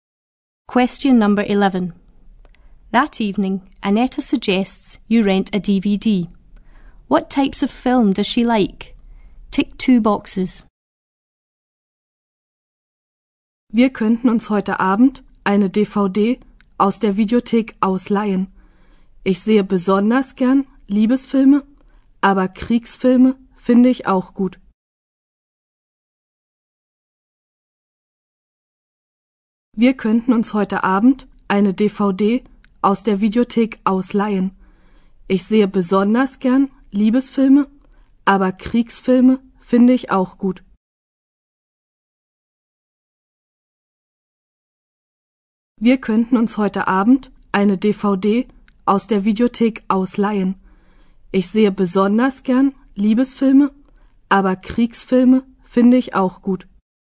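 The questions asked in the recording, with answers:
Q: What types of film does she like?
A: Romantic films and war films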